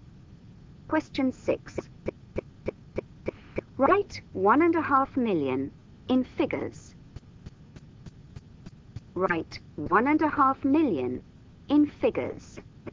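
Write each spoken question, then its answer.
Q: Write 1.5 million in figures.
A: 1500000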